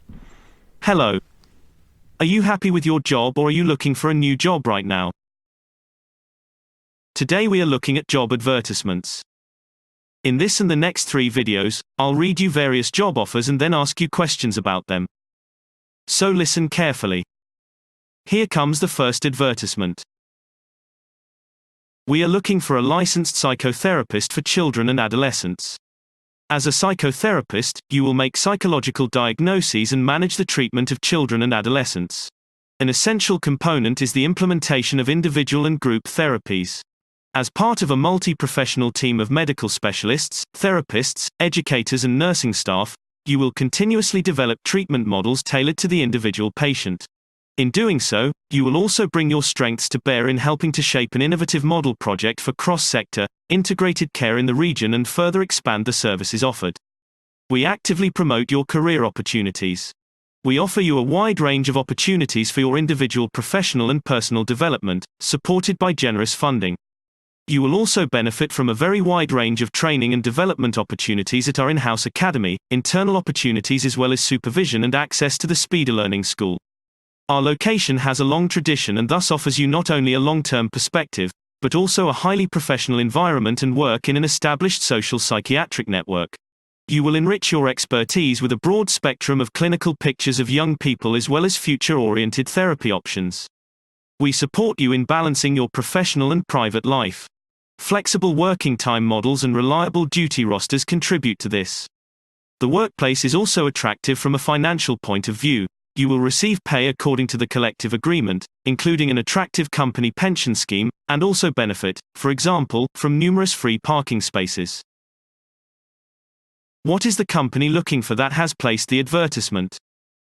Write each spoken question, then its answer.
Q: What is the company looking for that has placed the advertisement?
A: They are looking for a licensed psychotherapist for children and adolescents.